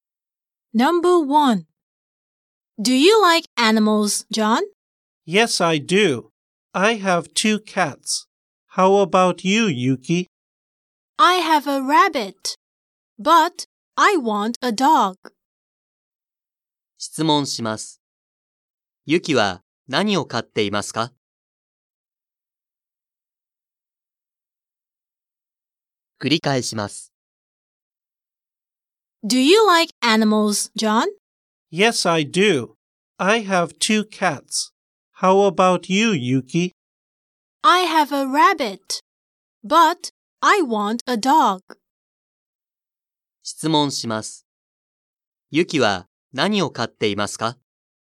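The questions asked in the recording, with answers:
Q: Yuki は何を飼っていますか?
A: うさぎ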